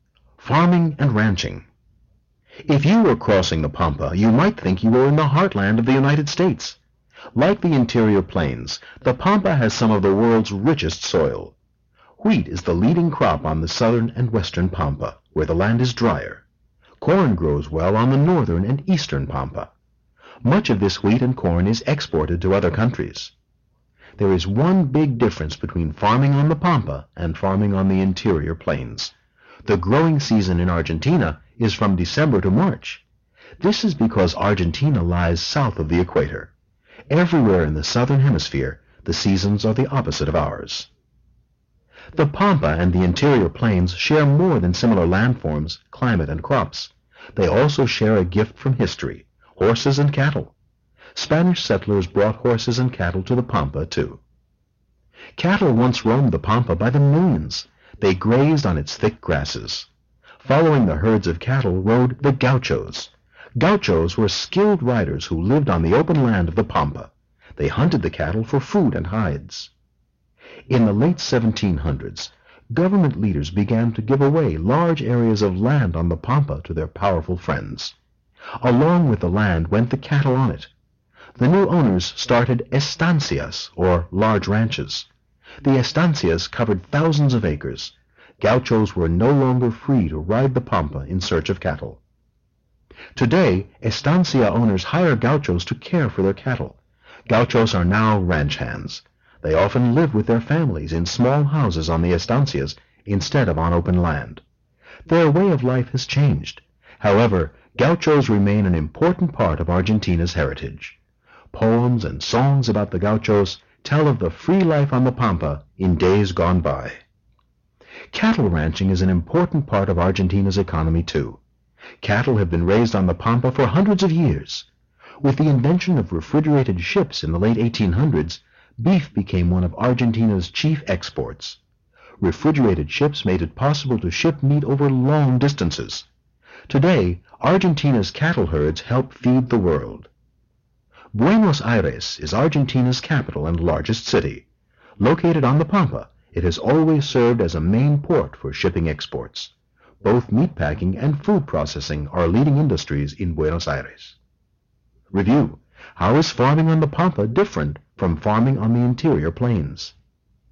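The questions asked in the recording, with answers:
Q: How is farming on the Pampa different from farming on the interior plains?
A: The growing season is from December to March because Argentina's seasons are the opposite of ours.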